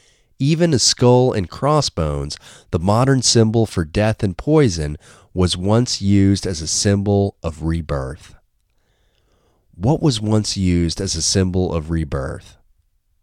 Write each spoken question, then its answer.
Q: What was once used as a symbol of rebirth?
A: A skull and crossbones was once used as a symbol of rebirth.